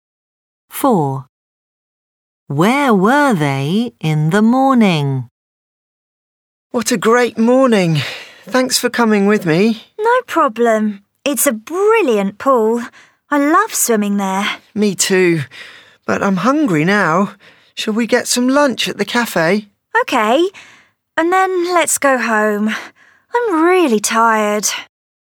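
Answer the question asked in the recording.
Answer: at the swimming pool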